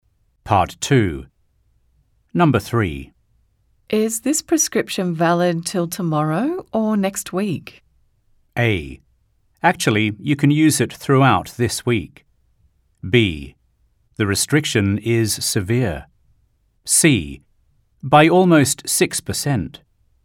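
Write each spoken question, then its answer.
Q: Is this prescription valid till tomorrow or next week?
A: A: Actually, you can use it throughout this week.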